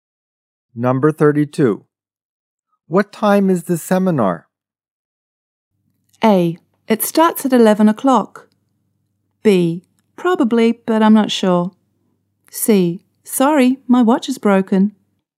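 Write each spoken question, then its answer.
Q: What time is the seminar?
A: A: It starts at 11 o'clock.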